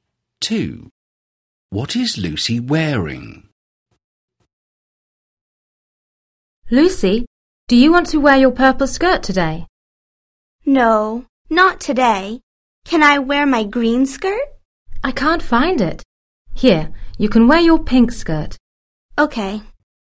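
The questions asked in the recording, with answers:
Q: What is Lucy wearing?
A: Her pink skirt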